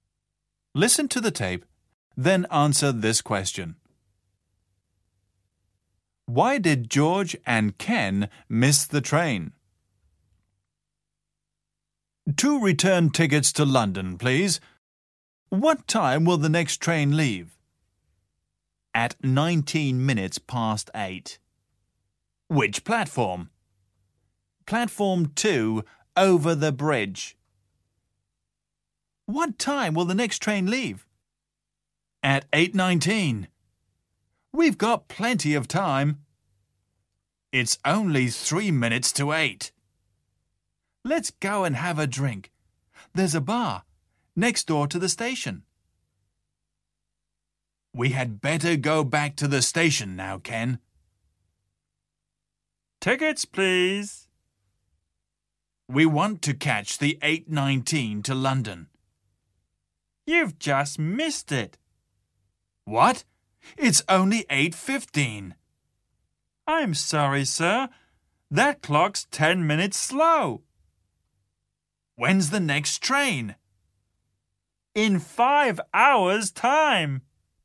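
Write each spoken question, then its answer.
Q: Why did George and Ken miss the train?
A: Because the clock in the bar was 10 minutes slow.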